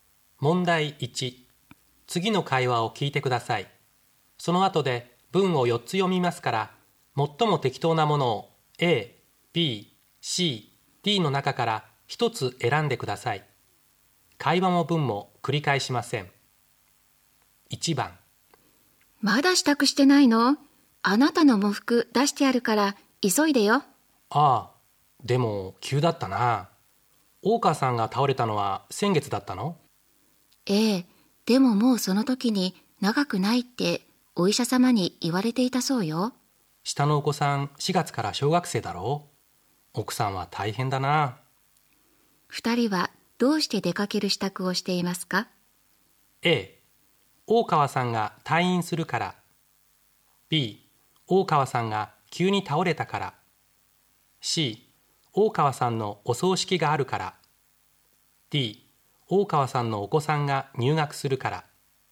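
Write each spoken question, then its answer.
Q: 二人はどうして出かける支度をしてい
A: C: 大川さんのお葬式があるから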